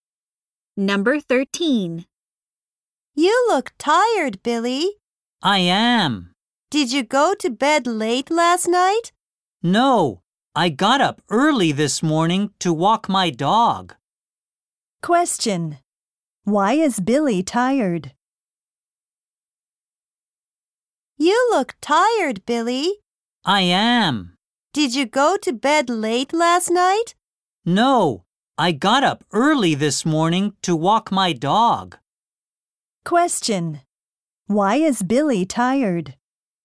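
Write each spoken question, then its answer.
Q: Why is Billy tired?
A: He got up early to walk his dog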